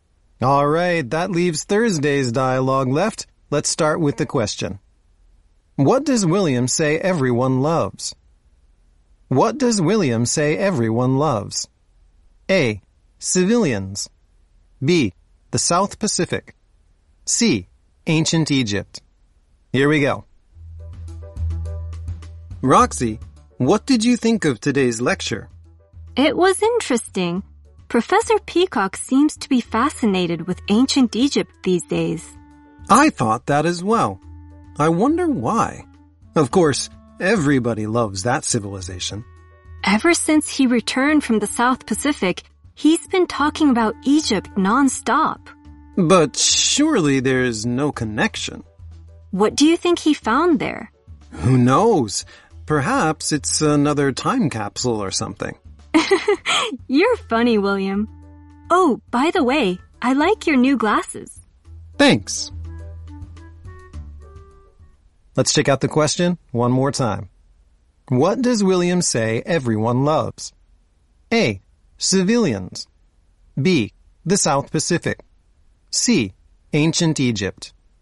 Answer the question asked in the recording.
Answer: C. Ancient Egypt.